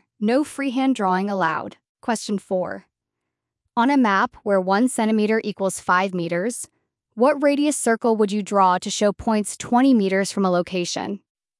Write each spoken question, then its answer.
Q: On a map where 1 centimeter equals 5 meters, what radius circle would you draw to show points 20 meters from a location?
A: Answer, 4 centimeters.